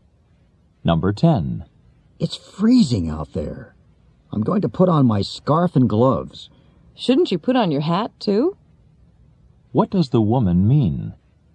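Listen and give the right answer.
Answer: He should wear a hat too.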